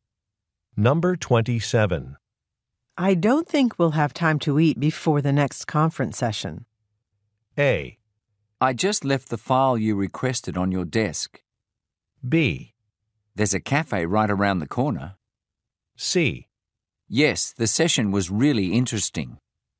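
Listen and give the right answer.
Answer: B: There's a cafe right around the corner.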